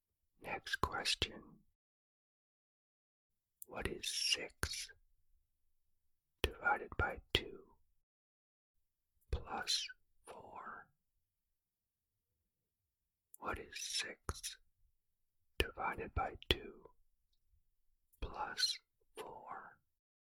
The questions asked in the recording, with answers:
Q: What is 6 divided by 2 plus 4?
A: The answer is 7.